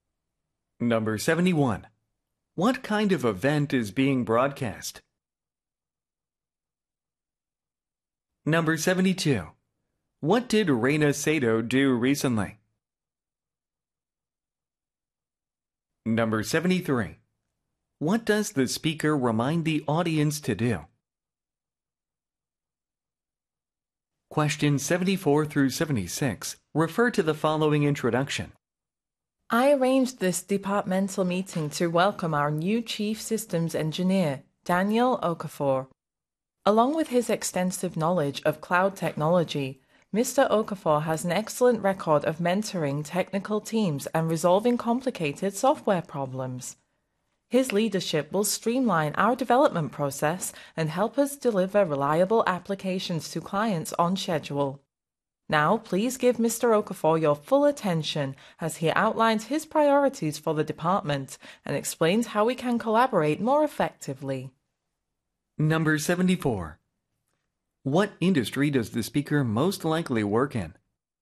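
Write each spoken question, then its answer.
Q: What kind of event is being broadcast?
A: A filmmaking competition show

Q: What did Reina Sato do recently?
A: She received the Silver Lens Prize

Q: What does the speaker remind the audience to do?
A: Vote for a favorite contestant through the mobile application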